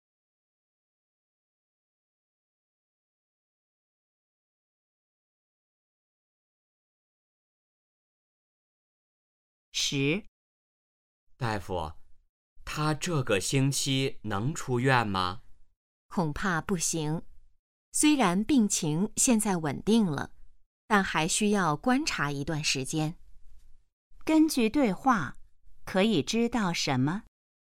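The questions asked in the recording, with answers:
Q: 根据对话,可以知道什么?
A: 病人这个星期还不能出院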